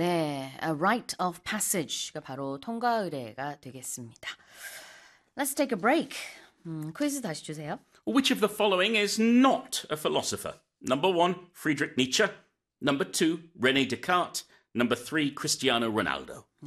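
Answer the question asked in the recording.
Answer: 3: Cristiano Ronaldo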